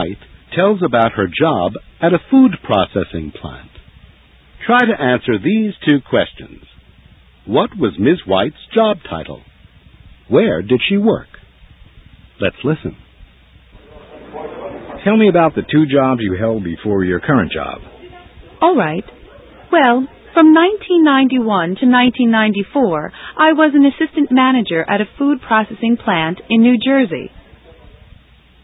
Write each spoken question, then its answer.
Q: What was Ms. White's job title?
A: She was assistant manager.

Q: Where did she work?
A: Ms. White didn't give the name of the company, but she said she worked at a food processing plant in New Jersey.